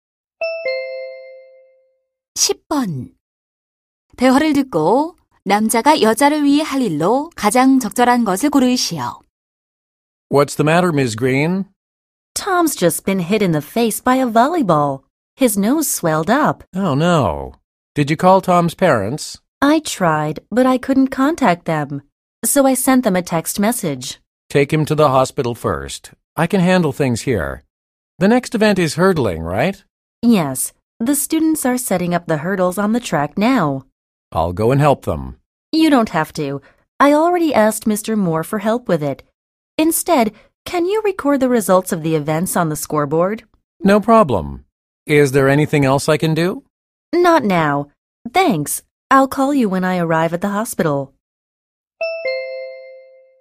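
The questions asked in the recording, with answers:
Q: 대화를 듣고 남자가 여자를 위해 할 일로 가장 적절한 것을 고르시오.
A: 경기 결과를 점수판에 기록하기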